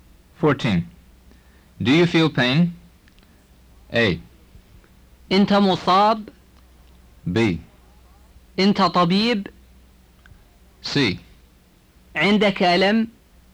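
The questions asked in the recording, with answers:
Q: Do you feel pain?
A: C: عندك ألم.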